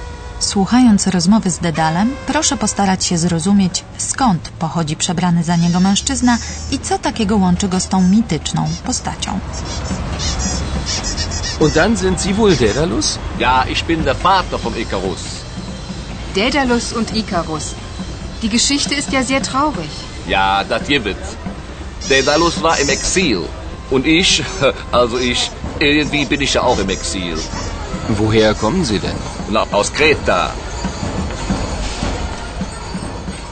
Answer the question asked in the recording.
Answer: Właśnie z tej wyspy pochodzi mężczyzna przebrany za Dedala.